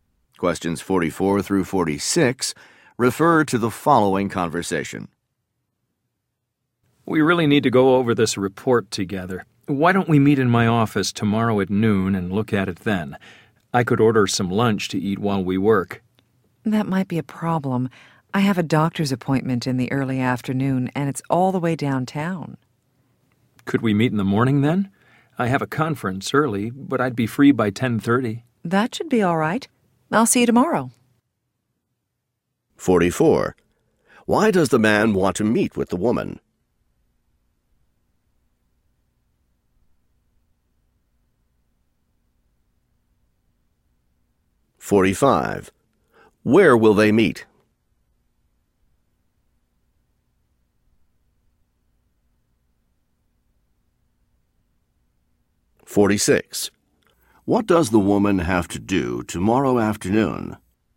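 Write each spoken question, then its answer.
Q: Why does the man want to meet with the woman?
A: To go over a report together

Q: What does the woman have to do tomorrow afternoon?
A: Go to a doctor's appointment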